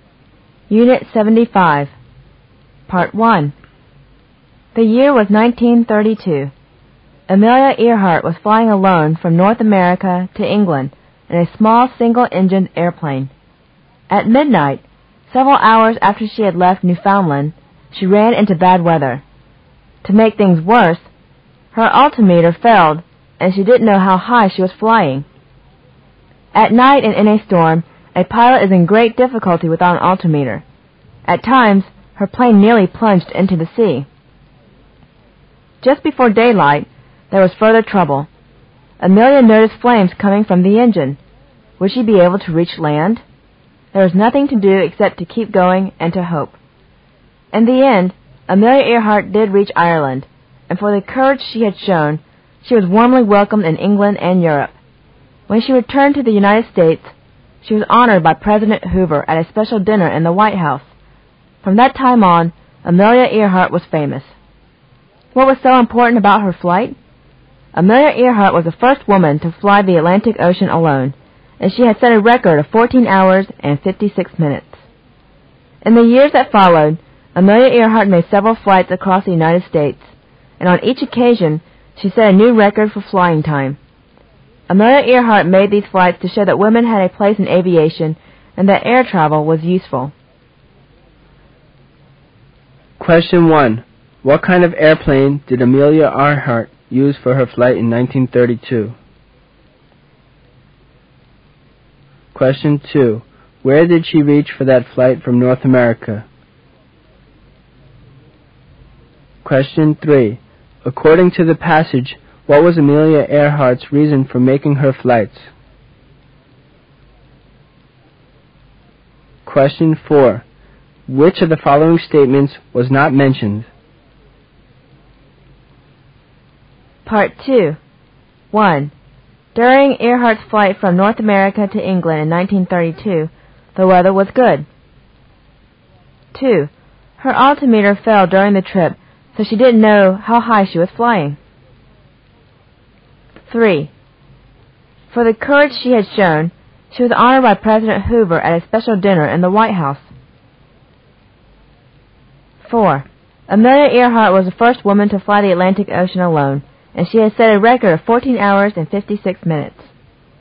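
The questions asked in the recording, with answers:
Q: What kind of airplane did Amelia Earhart use for her flight in 1932?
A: A small single-engine airplane

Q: Where did she reach for that flight from North America?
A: Ireland

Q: According to the passage, what was Amelia Earhart's reason for making her flights?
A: To show women had a place in aviation and air travel was useful

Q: During Earhart's flight from North America to England in 1932, the weather was good.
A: False

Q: Her altimeter fell during the trip, so she didn't know how high she was flying.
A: True

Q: Amelia Earhart was the first woman to fly the Atlantic Ocean alone, and she has set a record of 14 hours and 56 minutes.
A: True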